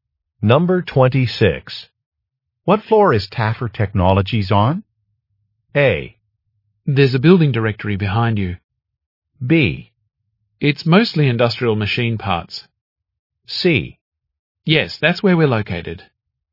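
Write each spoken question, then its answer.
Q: What floor is Taffer Technologies on?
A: A: There's a building directory behind you.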